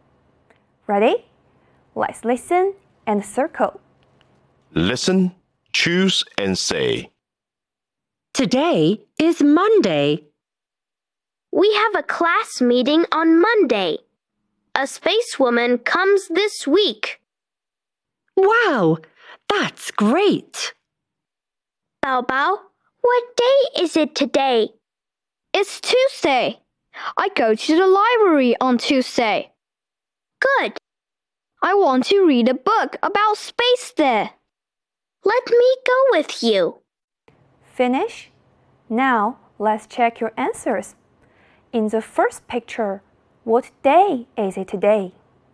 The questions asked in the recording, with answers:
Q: In the first picture, what day is it today?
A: Today is Monday.